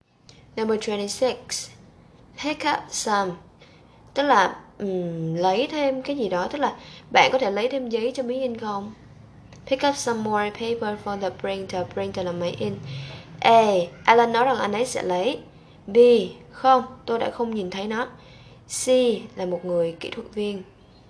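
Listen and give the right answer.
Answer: A: Alan nói rằng anh ấy sẽ lấy.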